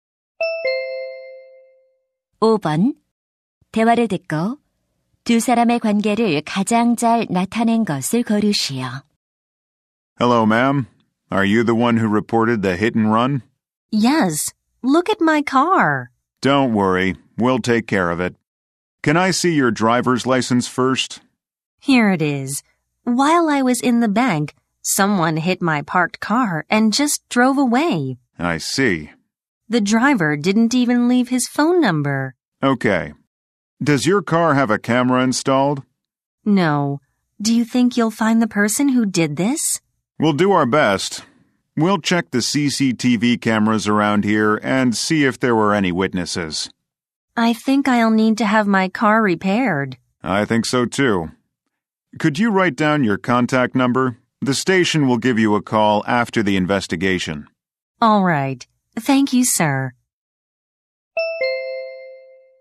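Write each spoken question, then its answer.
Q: 대화를 듣고 두 사람의 관계를 가장 잘 나타낸 것을 고르시오.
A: 경찰관 - 뺑소니 피해자(신고자)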